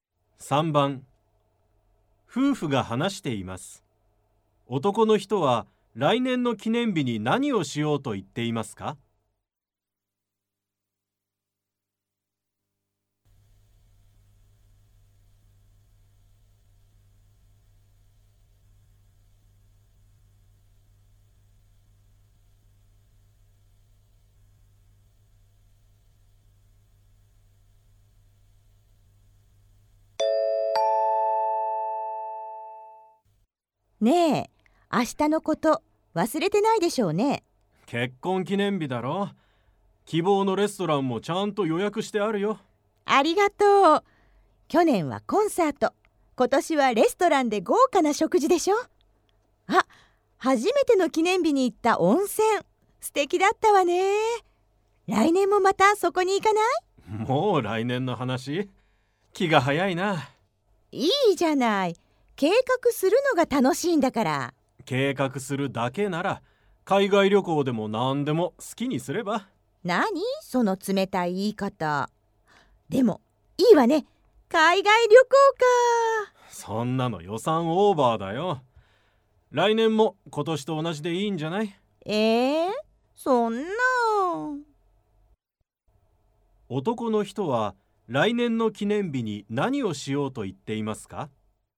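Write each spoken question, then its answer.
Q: 男の人は来年の記念日に何をしようと言っていますか?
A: レストランで豪華な食事をする(今年と同じ)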